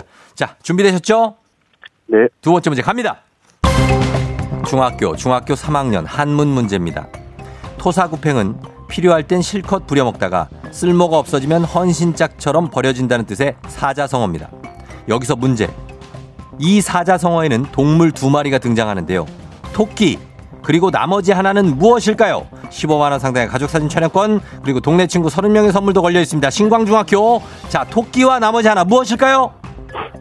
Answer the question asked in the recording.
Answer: 개. 개. 정답입니다.